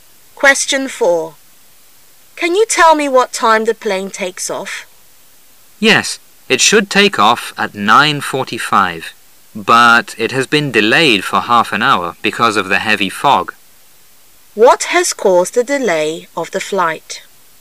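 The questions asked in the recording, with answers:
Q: What has caused the delay of the flight?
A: The heavy fog

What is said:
[解析] W: Can you tell me what time the plane takes off? M: Yes, it should take off at 9:45, but it has been delayed for half an hour because of the heavy fog. Q: What has caused the delay of the flight?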